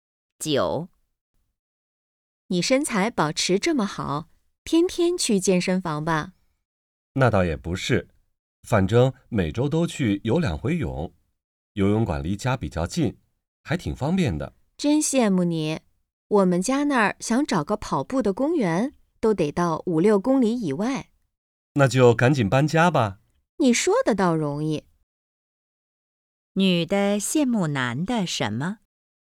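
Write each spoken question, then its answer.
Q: 女的羡慕男的什么?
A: 家附近有游泳馆,锻炼很方便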